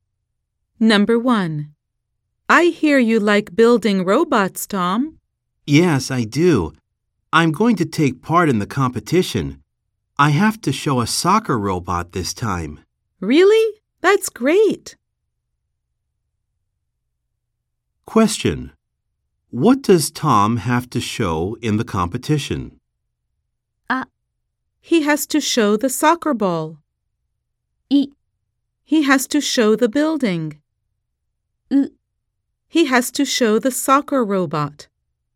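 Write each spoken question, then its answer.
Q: What does Tom have to show in the competition?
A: C: He has to show the soccer robot.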